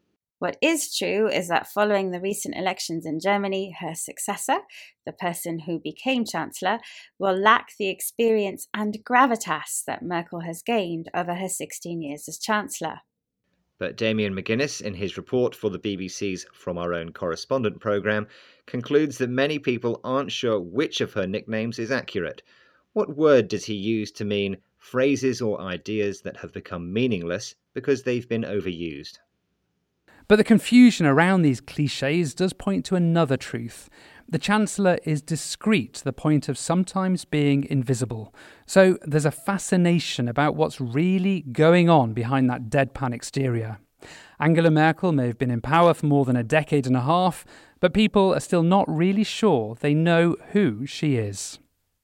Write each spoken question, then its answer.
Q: What word does he use to mean phrases or ideas that have become meaningless because they've been overused?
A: He used the word clichés to mean phrases or ideas that have become meaningless because they've been overused.